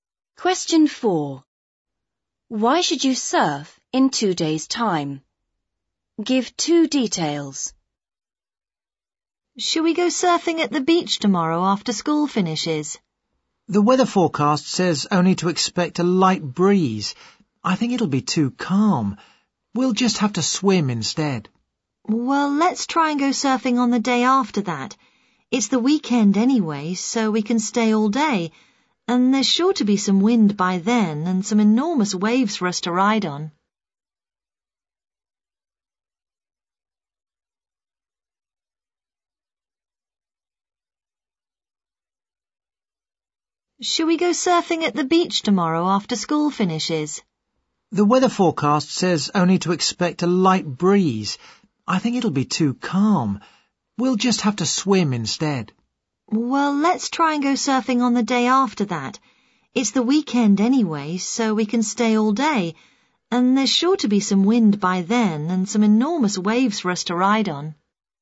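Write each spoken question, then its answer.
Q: Why should you surf in 2 days' time?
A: There will be wind and enormous waves; it's the weekend so you can stay all day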